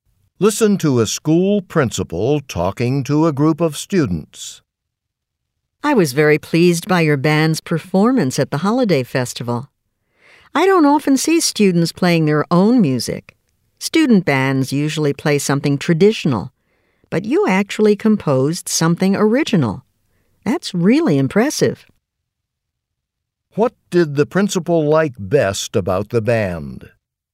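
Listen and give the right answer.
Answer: They played original music they composed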